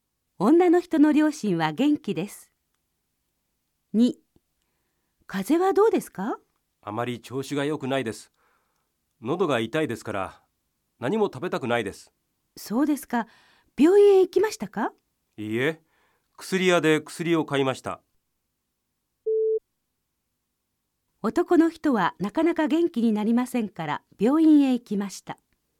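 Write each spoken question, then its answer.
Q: 男の人はなかなか元気になりませんから、病院へ行きました。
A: 正しくない(薬屋で薬を買った)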